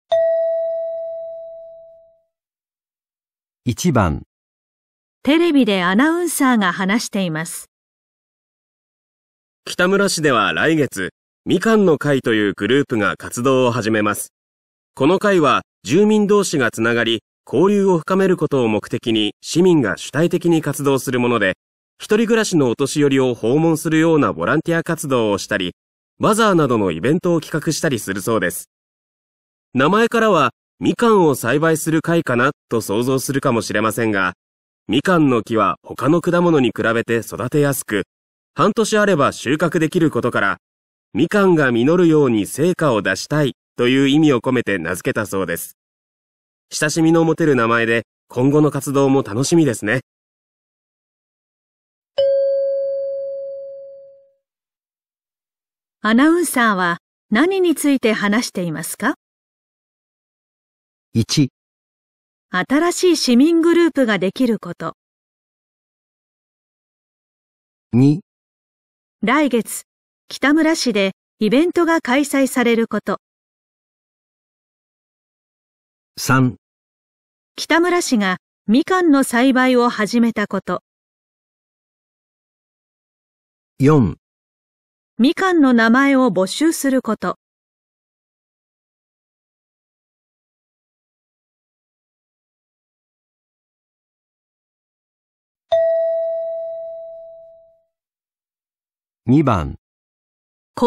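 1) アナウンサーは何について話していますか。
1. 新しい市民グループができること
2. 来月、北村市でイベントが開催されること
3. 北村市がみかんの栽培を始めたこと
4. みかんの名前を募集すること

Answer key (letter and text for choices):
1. 1. 新しい市民グループができること

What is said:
名前 からはみかんを栽培する会かなと想像するかもしれませんが、みかんの木は他の果物に比べて 育てやすく、半年あれば収穫できることからみかんが実ように成果を出したいと言う意味を込 めて名付けたそうです。親しみが持てる名前で今後の活動も楽しみですね。

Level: 【N2 第2回】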